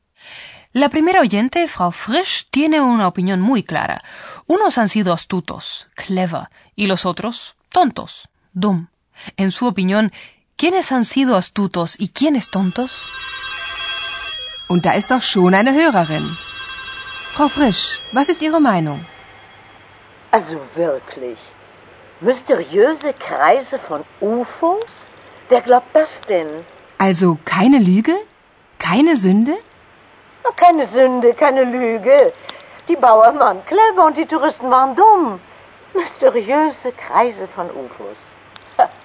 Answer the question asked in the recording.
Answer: En opinión de Frau Frisch, los agricultores, Bauern, fueron astutos y los turistas, tontos.